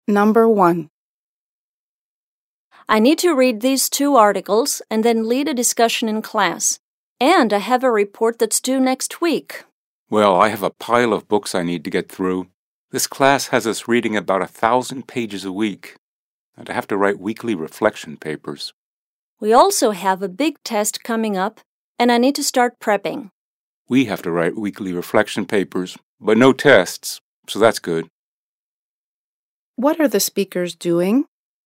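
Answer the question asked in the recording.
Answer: Comparing the work they have to do for their classes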